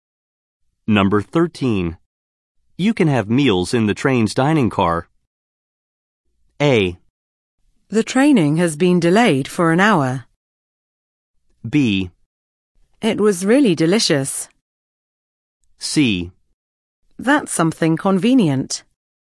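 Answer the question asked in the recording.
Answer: C: That's something convenient.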